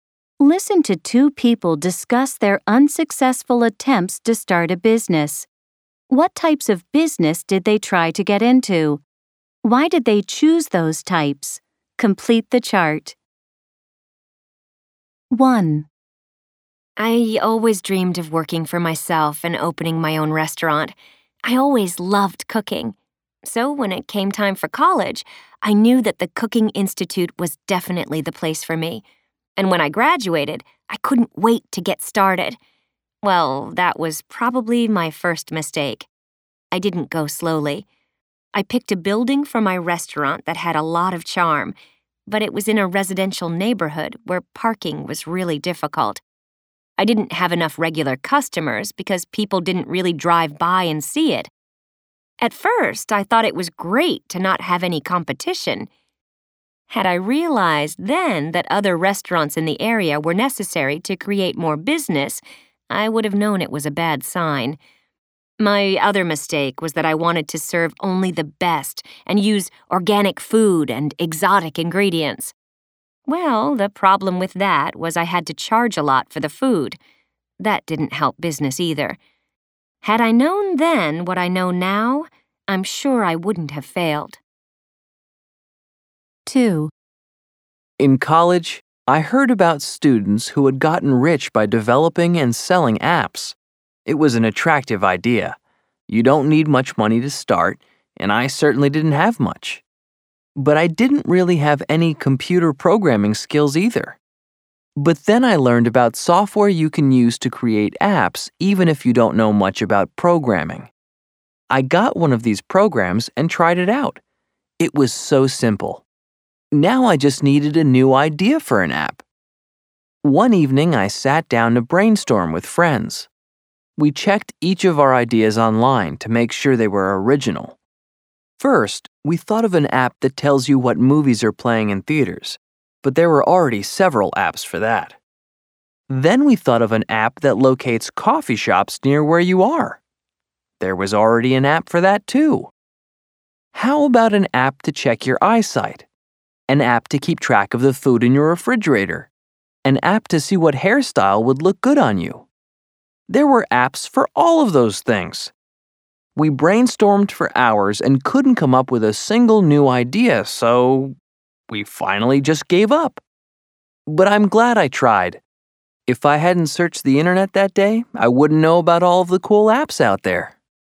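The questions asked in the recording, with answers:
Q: What types of business did they try to get into?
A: Speaker 1: a restaurant; Speaker 2: developing and selling apps

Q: Why did they choose those types?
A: Speaker 1 always loved cooking and dreamed of working for herself; Speaker 2 heard students got rich selling apps, and you don't need much money to start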